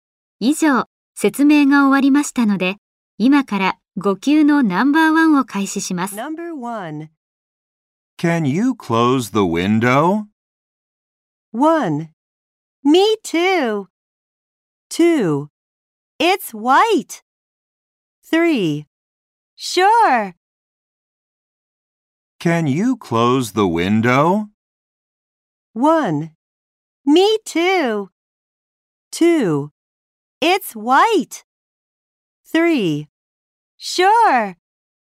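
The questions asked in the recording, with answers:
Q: Can you close the window?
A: 3: Sure.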